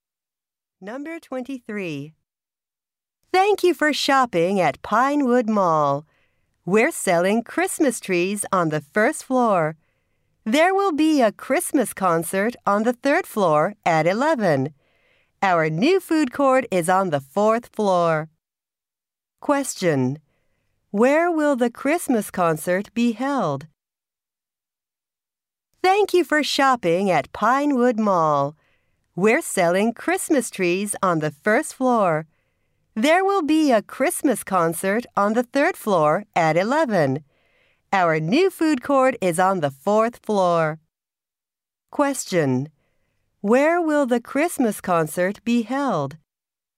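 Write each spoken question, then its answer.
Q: Where will the Christmas concert be held?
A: On the third floor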